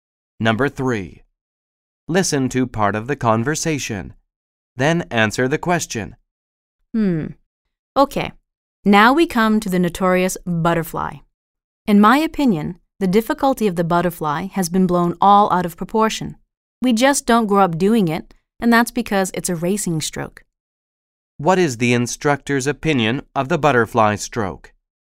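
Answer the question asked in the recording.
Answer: Its difficulty has been blown out of proportion; people just don't grow up doing it because it's a racing stroke.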